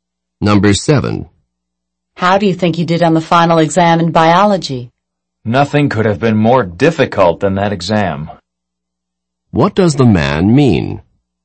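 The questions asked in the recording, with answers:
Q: What does the man mean?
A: The exam was extremely difficult.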